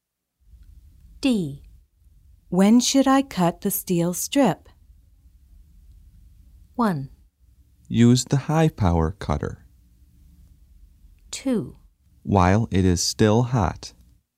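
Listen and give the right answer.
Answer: 2: While it is still hot.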